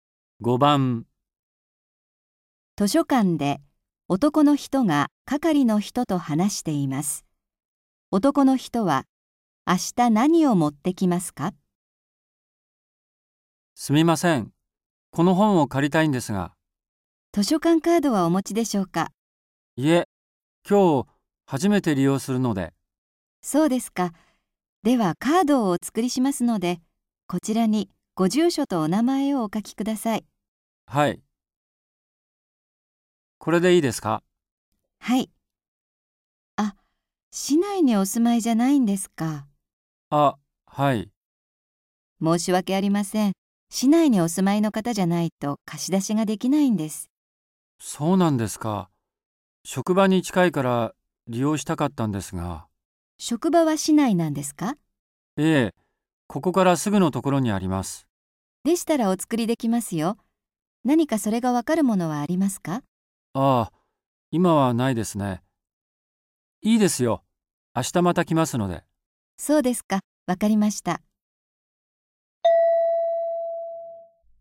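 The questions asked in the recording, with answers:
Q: 男の人は明日何を持ってきますか?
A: 職場が市内にあることがわかるもの(社員証など)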